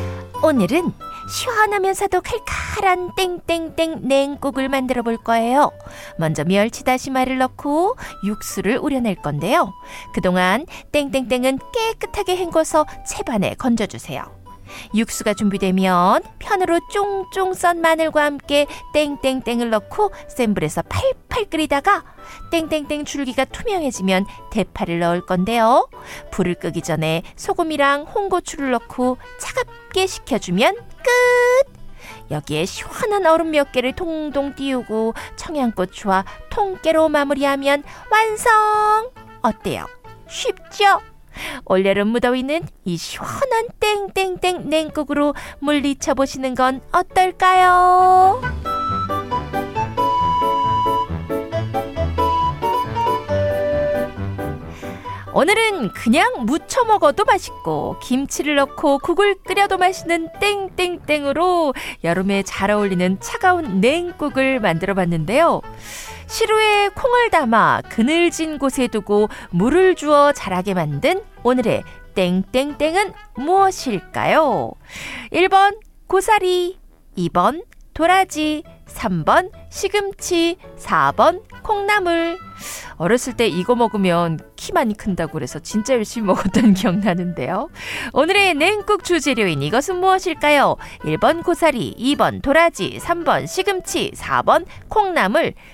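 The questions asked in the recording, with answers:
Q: 오늘의 냉국 주재료인 이것은 무엇일까요? 1번 고사리, 2번 도라지, 3번 시금치, 4번 콩나물.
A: 4번: 콩나물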